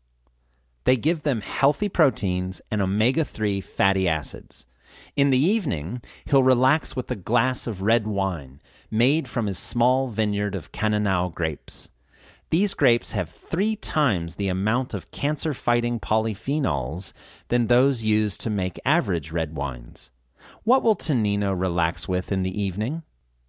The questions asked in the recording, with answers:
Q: What will Tonino relax with in the evening?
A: He'll relax with a glass of red wine.